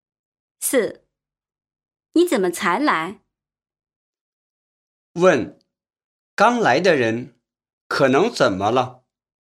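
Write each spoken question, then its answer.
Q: 刚来的人可能怎么了?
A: 来晚了(迟到了)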